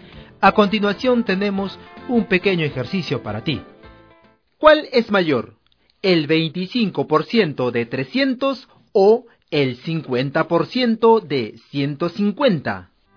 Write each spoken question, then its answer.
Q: ¿Cuál es mayor, el 25% de 300 o el 50% de 150?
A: Seguramente te diste cuenta que ambos son iguales.